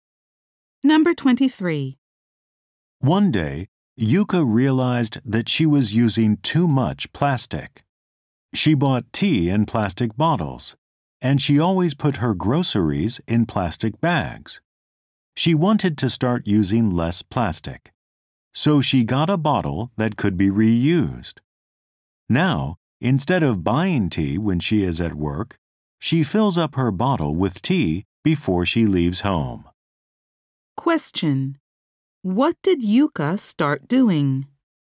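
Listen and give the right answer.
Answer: Bringing tea from home in a reusable bottle.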